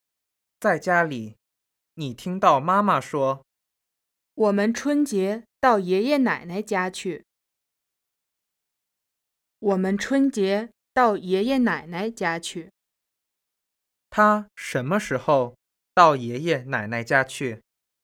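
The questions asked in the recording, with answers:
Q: 他什么时候到爷爷奶奶家去?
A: 春节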